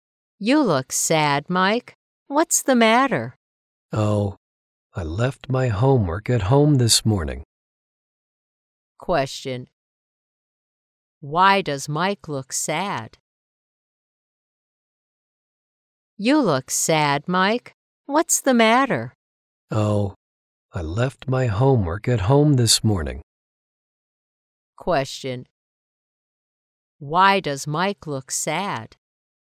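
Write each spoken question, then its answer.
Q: Why does Mike look sad?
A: He left his homework at home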